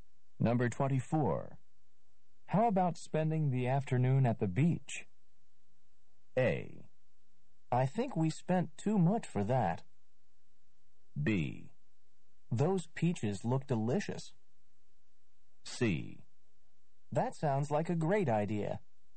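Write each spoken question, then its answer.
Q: How about spending the afternoon at the beach?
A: C: That sounds like a great idea.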